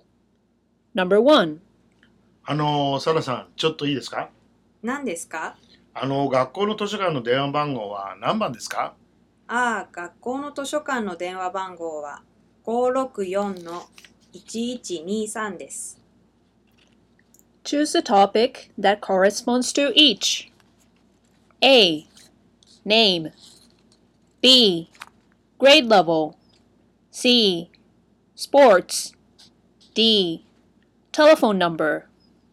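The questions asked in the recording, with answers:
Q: Choose a topic that corresponds to each.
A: D: Telephone number.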